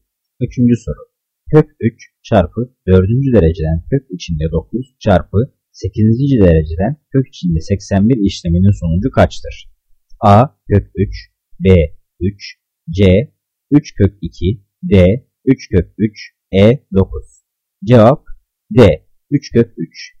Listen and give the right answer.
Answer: Cevap D. 3 kök 3.